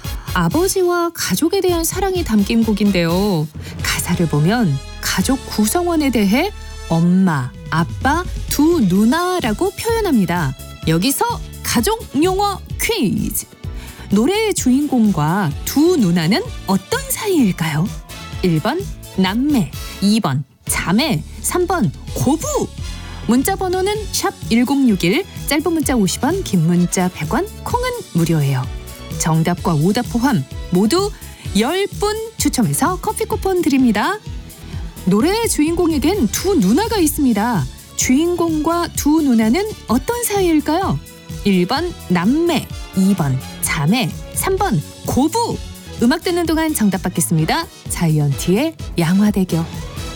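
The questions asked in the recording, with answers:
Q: 노래의 주인공과 두 누나는 어떤 사이일까요?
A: 1번: 남매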